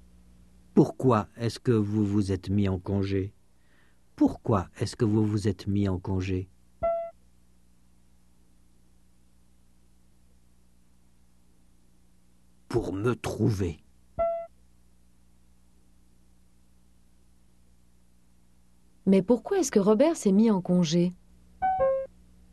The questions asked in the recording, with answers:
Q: Mais pourquoi est-ce que Robert s'est mis en congé?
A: Pour se trouver.